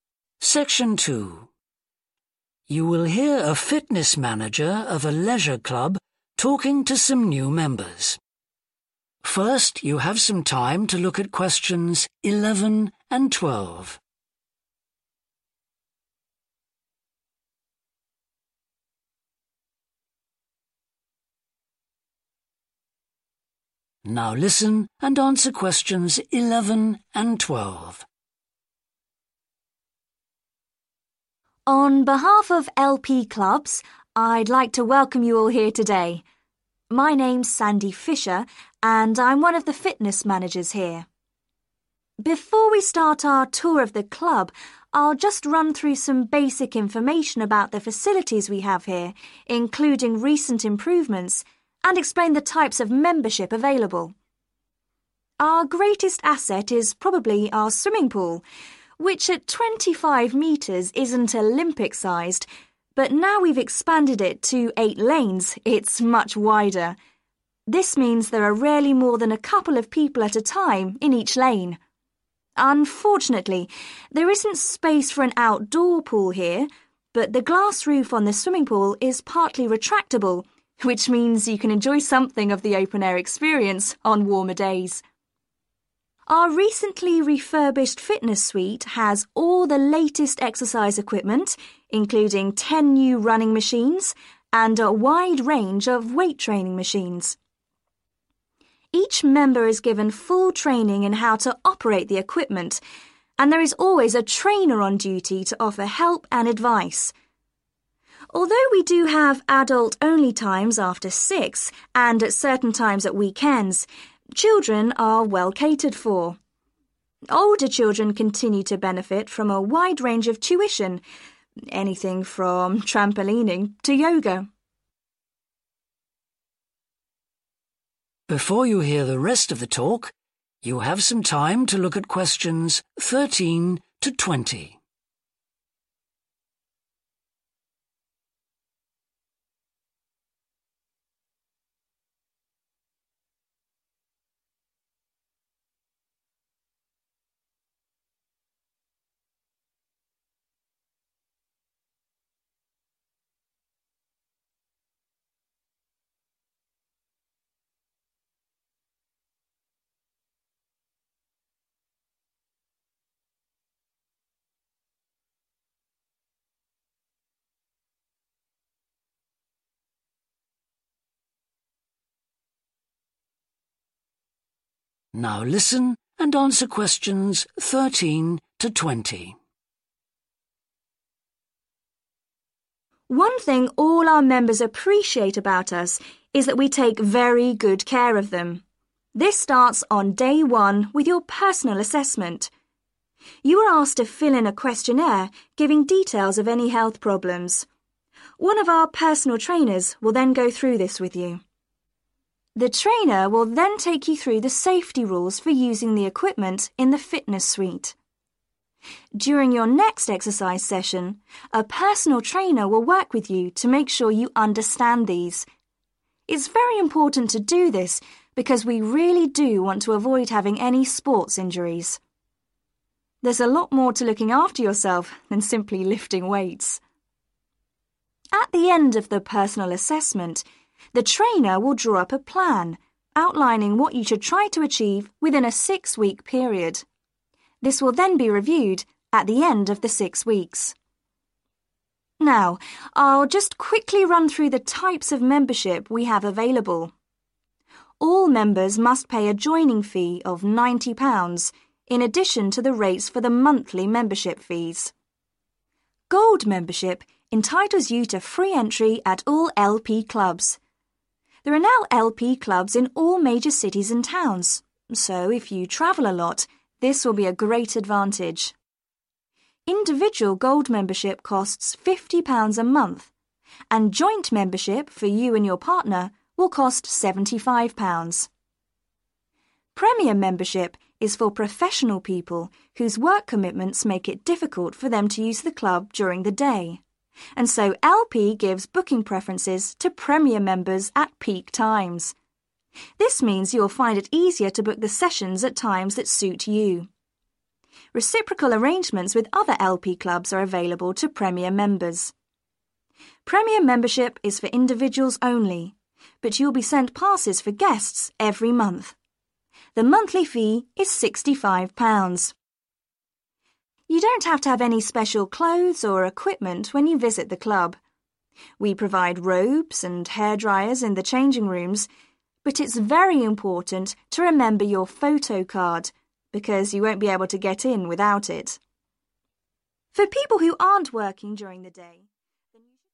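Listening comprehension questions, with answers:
Choose TWO letters A–E.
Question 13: New members should describe any 13............ .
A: health problems

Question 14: The 14.................. will be explained to you before you use the equipment.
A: safety rules

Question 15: You will be given a six-week 15.................. .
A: plan

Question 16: There is a compulsory £90 16............. fee for members.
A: joining

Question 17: Gold members are given 17................... to all the LP clubs.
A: free entry

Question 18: Premier members are given priority during 18........................ hours.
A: peak

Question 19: Premier members can bring some 19................... every month.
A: guests

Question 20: Members should always take their 20................ with them.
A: photo card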